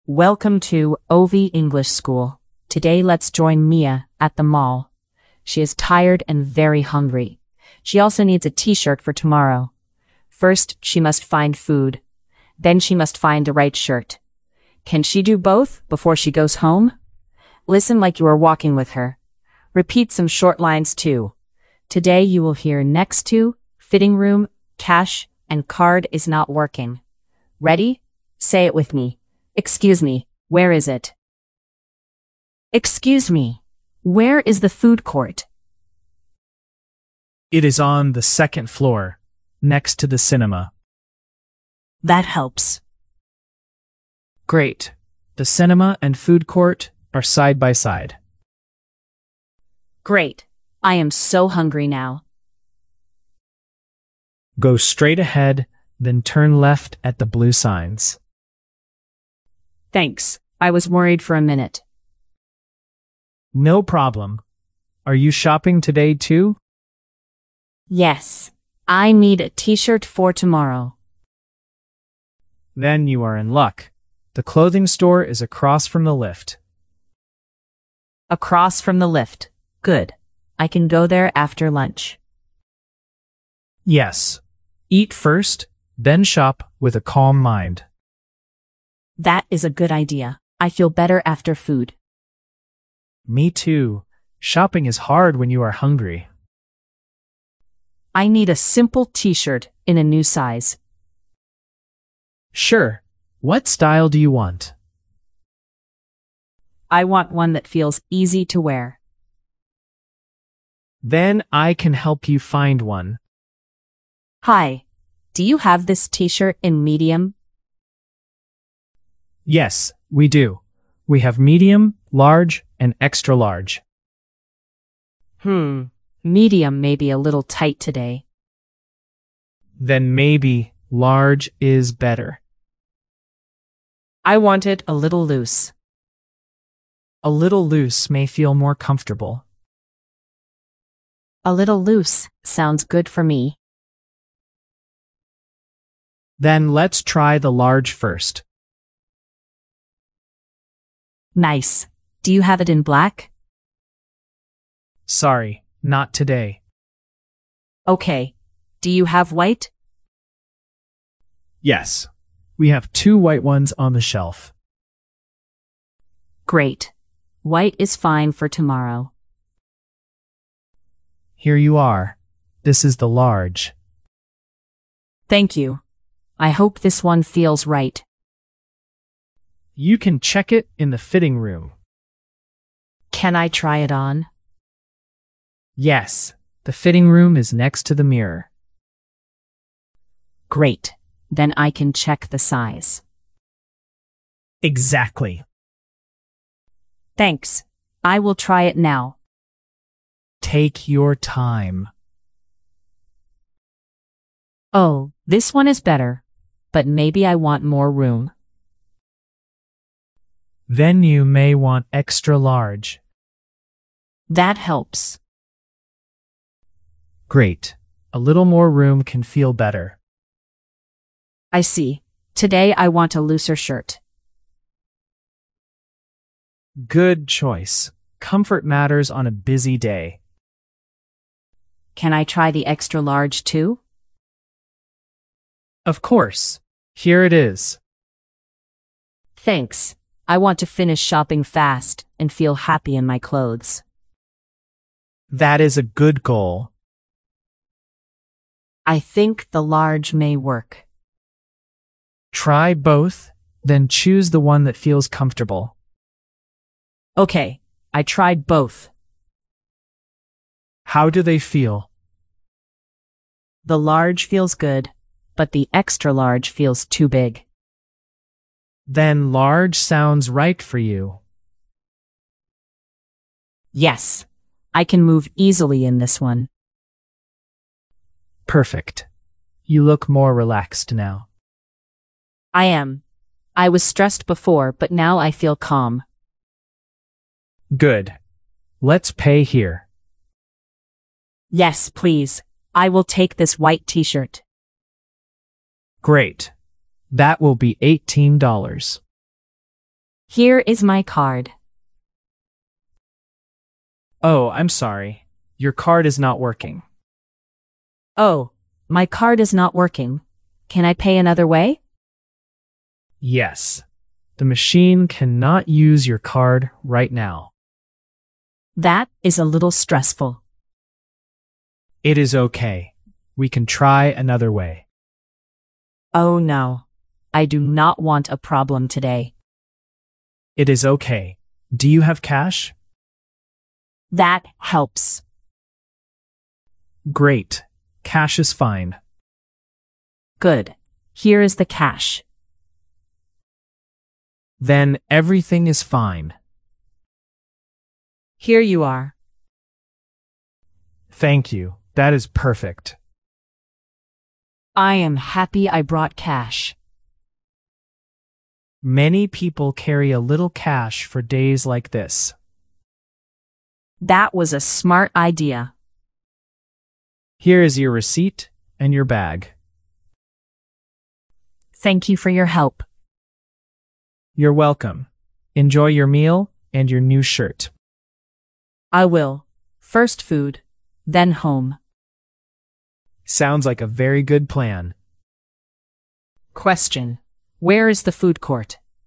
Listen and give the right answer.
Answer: It is on the second floor, next to the cinema.